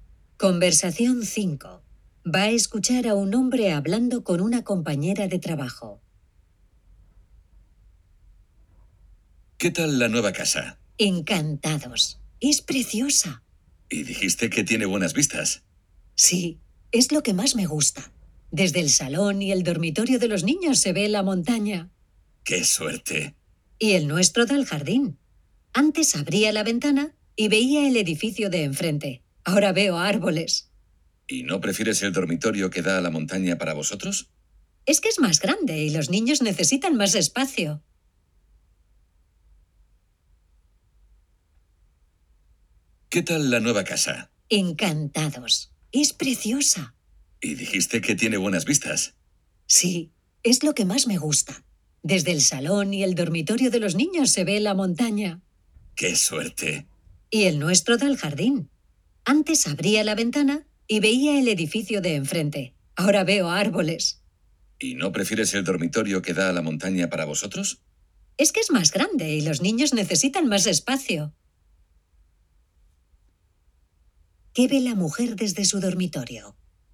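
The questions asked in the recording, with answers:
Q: ¿Qué ve la mujer desde su dormitorio?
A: El jardín (árboles)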